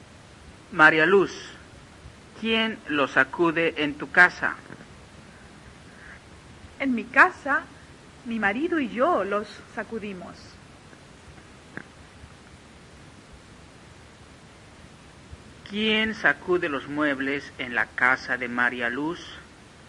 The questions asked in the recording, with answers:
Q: ¿Quién sacude los muebles en la casa de María Luz?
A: María Luz y su marido sacuden los muebles, o lo sacuden María Luz y su marido.